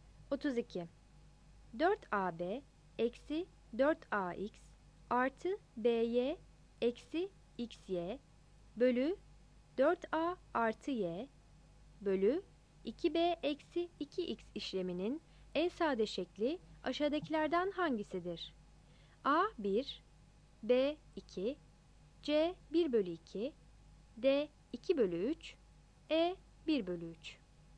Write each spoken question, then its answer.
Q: 4AB eksi 4AX artı BY eksi XY bölü 4A artı Y bölü 2B eksi 2X işleminin en sade şekli aşağıdakilerden hangisidir?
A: 32 C